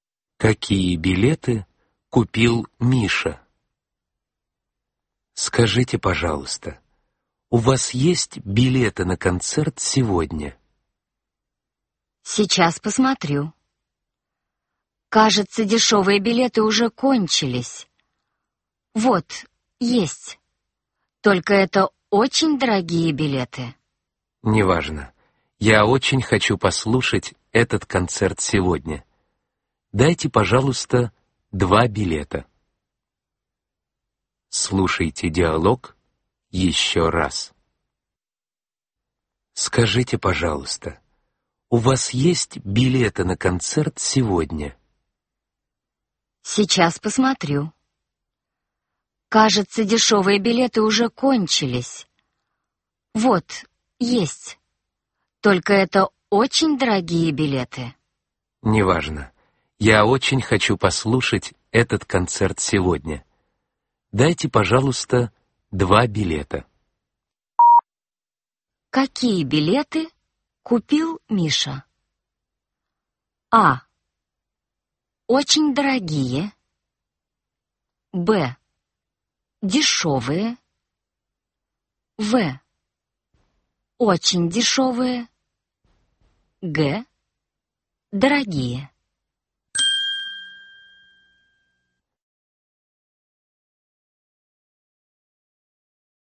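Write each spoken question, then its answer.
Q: Какие билеты купил Миша?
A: А: Очень дорогие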